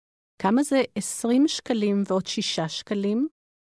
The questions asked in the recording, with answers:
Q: כמה זה 20 שקלים ועוד 6 שקלים?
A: 26 שקלים.